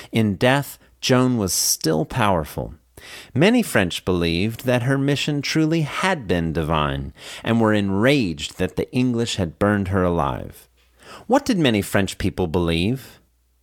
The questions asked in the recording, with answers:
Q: What did many French people believe?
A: Many French people believed that her mission truly had been divine.